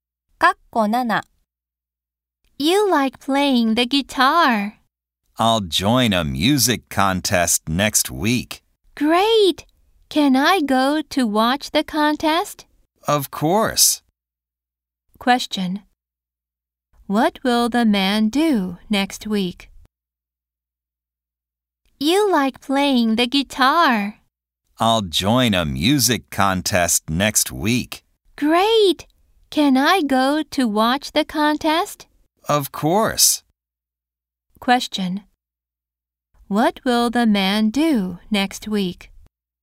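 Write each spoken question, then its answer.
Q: What will the man do next week?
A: Join a music contest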